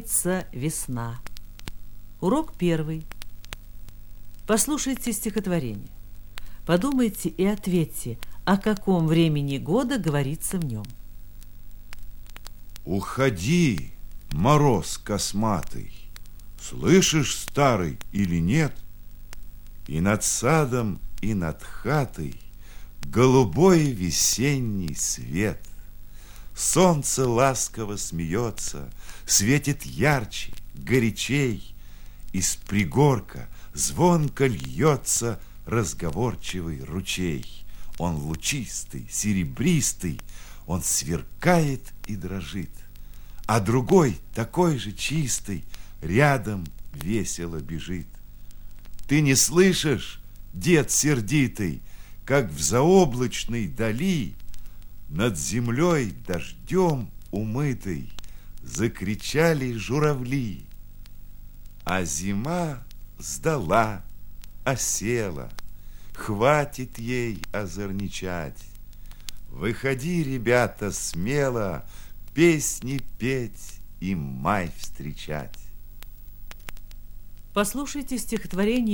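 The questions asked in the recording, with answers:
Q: Подумайте и ответьте, о каком времени года говорится в нем.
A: О весне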